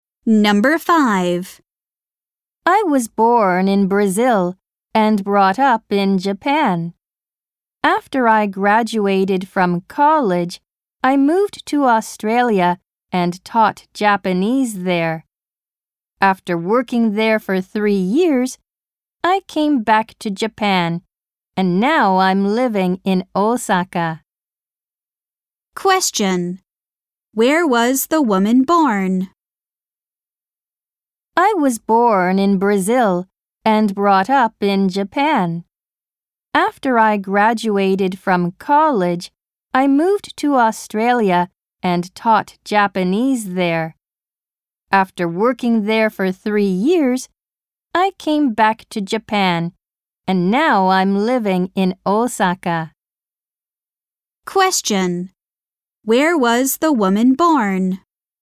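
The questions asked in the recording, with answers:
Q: Where was the woman born?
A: In Brazil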